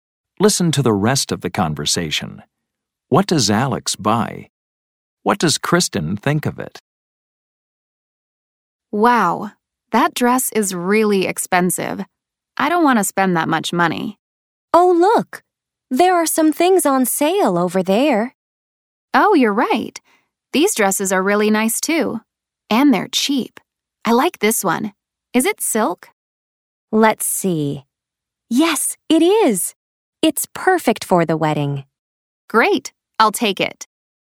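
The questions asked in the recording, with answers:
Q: What does Alex buy?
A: A cheap silk dress that was on sale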